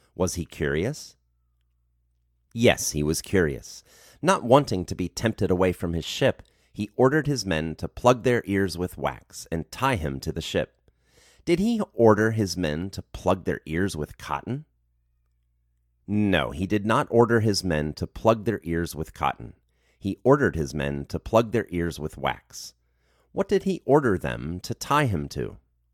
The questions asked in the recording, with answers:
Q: What did he order them to tie him to?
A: He ordered them to tie him to the ship.